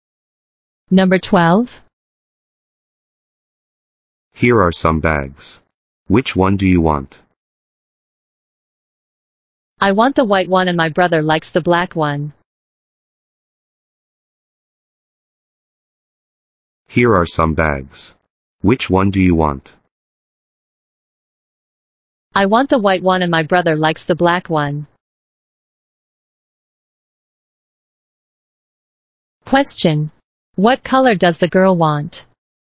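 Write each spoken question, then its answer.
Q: Question. What color does the girl want?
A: White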